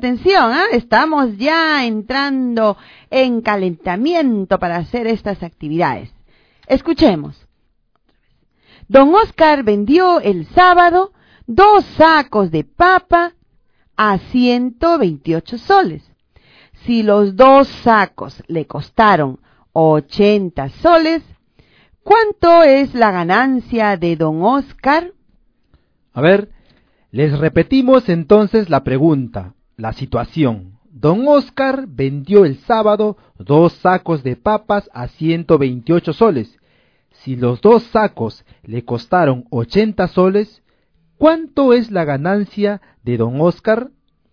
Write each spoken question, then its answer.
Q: Si los 2 sacos le costaron 80 soles, ¿cuánto es la ganancia de don Oscar?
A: 48 soles.